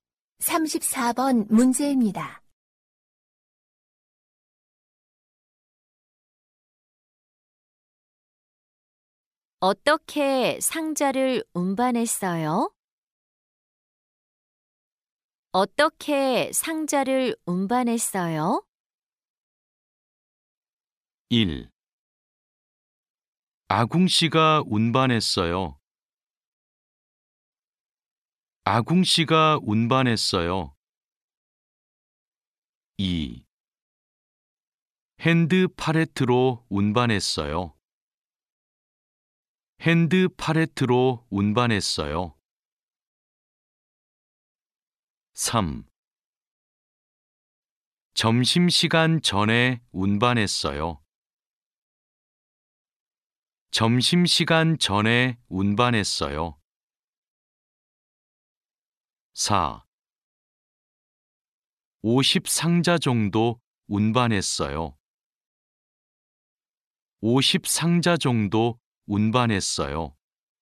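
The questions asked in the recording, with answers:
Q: 어떻게 상자를 운반했어요?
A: 2: 핸드 팔레트로 운반했어요.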